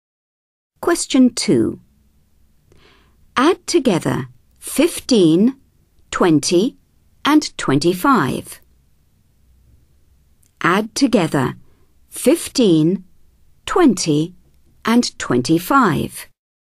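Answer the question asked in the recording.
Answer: 60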